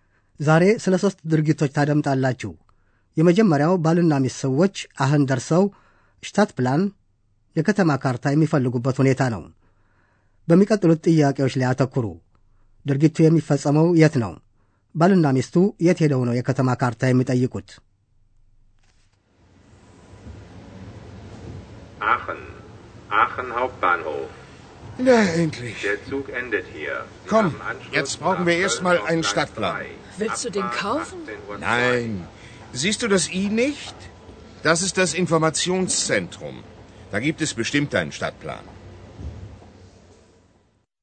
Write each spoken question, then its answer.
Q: ድርጊቱ የሚፈጸመው የት ነው?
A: ድርጊቱ በአንድ ባቡር ጣቢያ እንደሚፈጸም

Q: ባልና ሚስቱ የት ሄደው ነው የከተማ ካርታ የሚጠይቁት?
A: ማንኛውም ሰው ወደ ማዕከሉ ሄዶ የከተማ ካርታ ለማግኘት ይችላል።